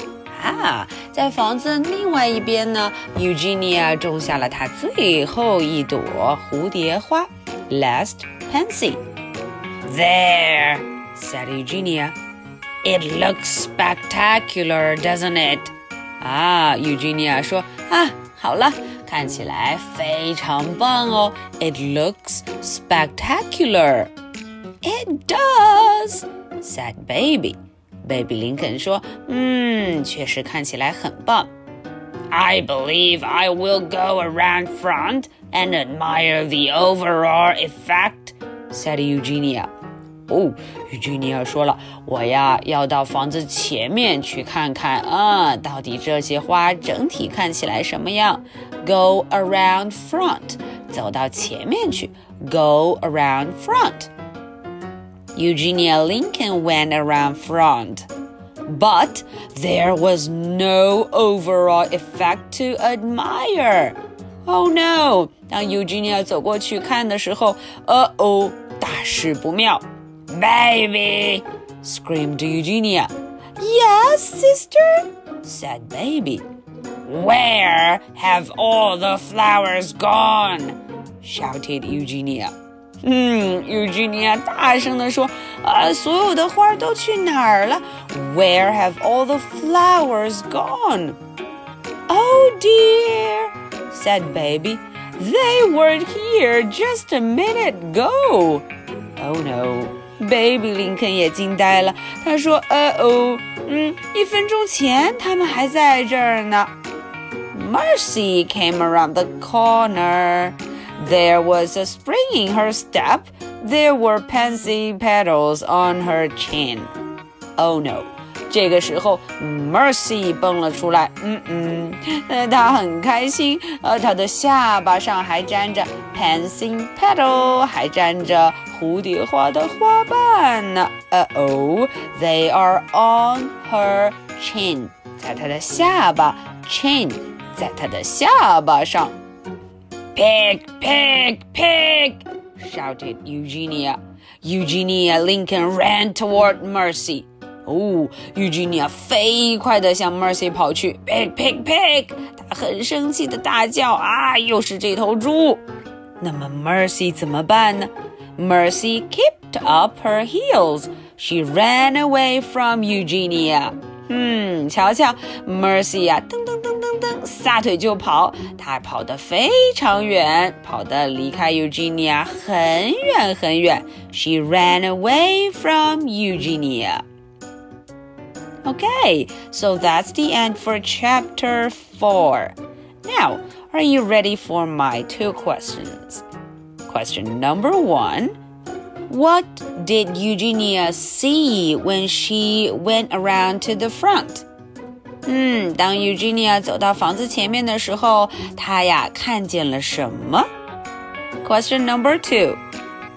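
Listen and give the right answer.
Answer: All the flowers were gone; there was nothing to admire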